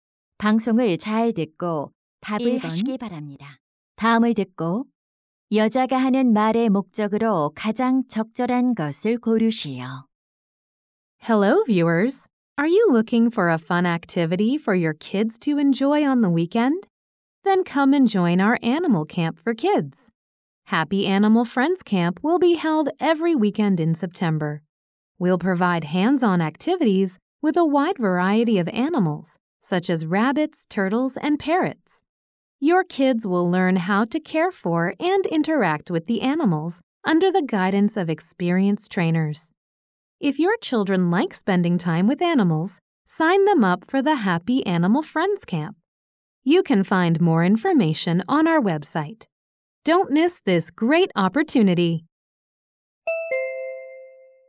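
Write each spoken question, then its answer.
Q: 다음을 듣고 여자가 하는 말의 목적으로 가장 적절한 것을 고르시오.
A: 어린이 동물 캠프 참가를 홍보하려고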